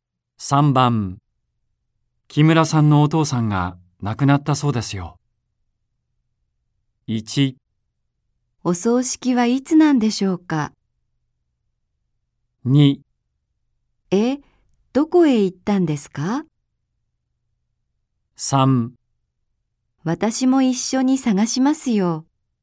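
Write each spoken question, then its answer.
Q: 木村さんのお父さんが亡くなったそうですよ。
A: 1: お葬式はいつなんでしょうか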